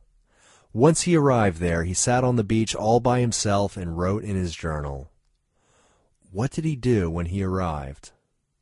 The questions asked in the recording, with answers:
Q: What did he do when he arrived?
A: He sat on the beach and wrote in his journal.